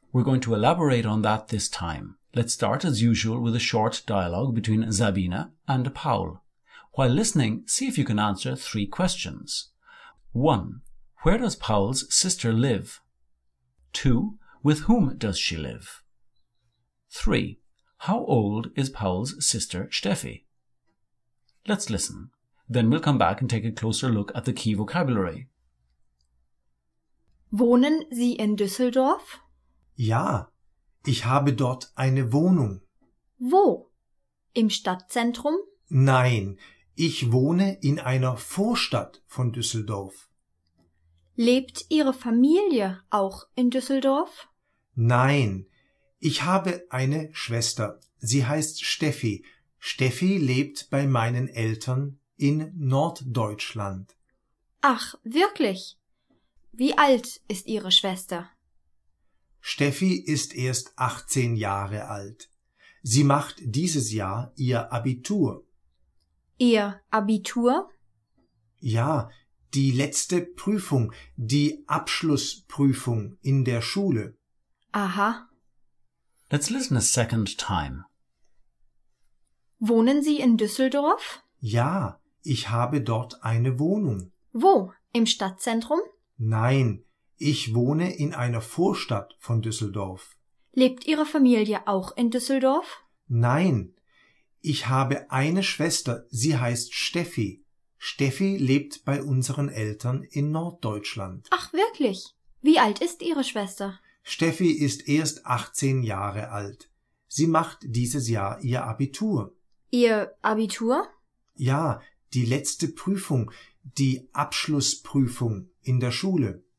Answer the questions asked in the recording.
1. Paul's sister lives in northern Germany.
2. She lives with her parents.
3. She is 18 years old.